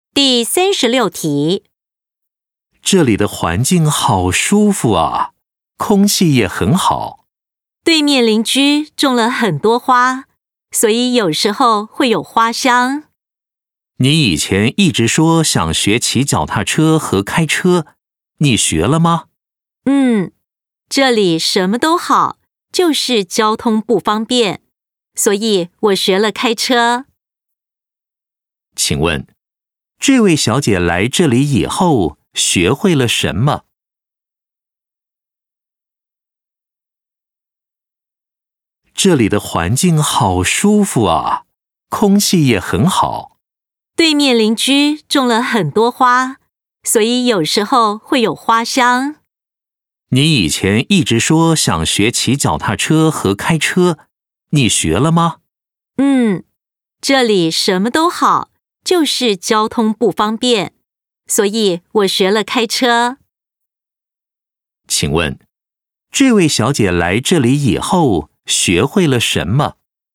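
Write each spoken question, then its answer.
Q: 请问,这位小姐来这里以后学会了什么?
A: 开车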